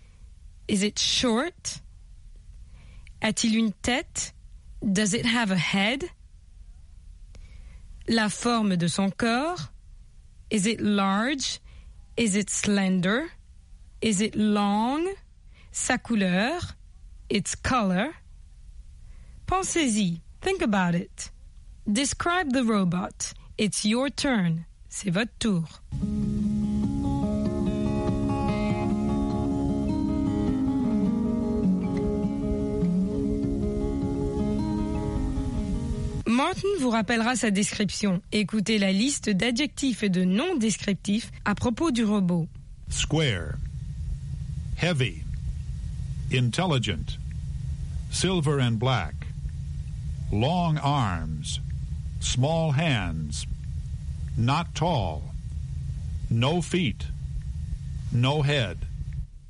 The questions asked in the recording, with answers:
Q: Is it tall?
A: not tall

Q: Does it have a head?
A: no head